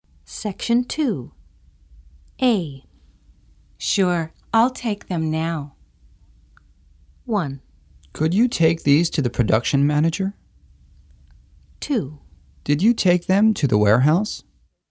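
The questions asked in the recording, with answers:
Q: Sure, I'll take them now.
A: 1: Could you take these to the production manager?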